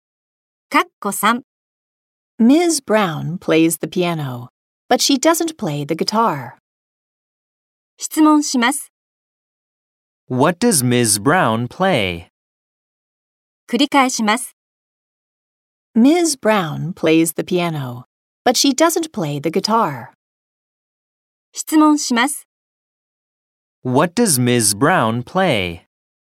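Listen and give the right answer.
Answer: She plays the piano.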